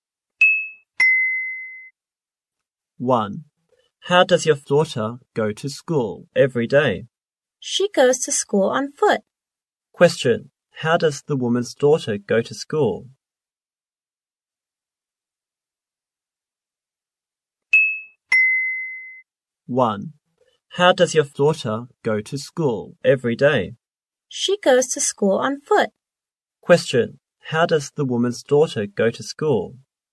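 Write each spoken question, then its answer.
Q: Question. How does the woman's daughter go to school?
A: On foot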